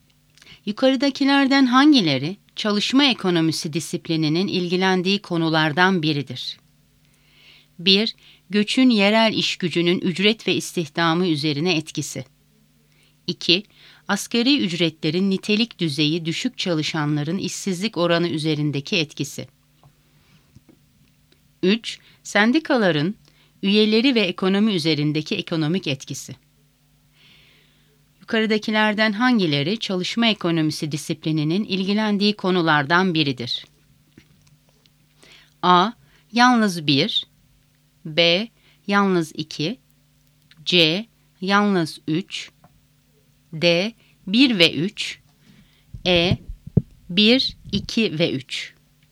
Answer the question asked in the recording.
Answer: Doğru cevap E. 1, 2 ve 3.